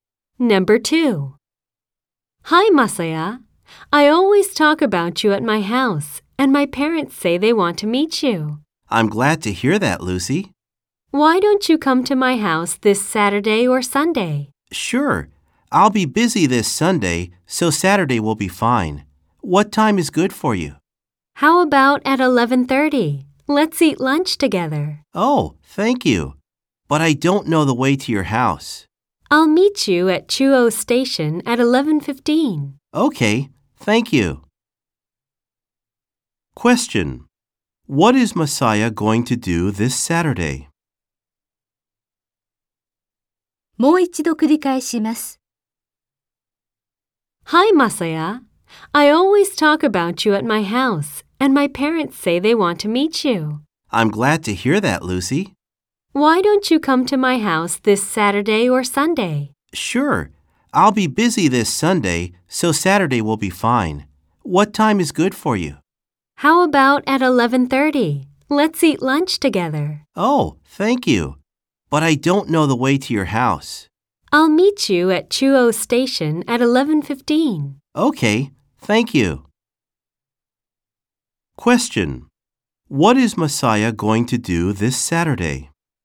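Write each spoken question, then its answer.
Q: What is Masaya going to do this Saturday?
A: Meet Lucy at Chuo Station at 11:15 and go to her house to eat lunch with her family.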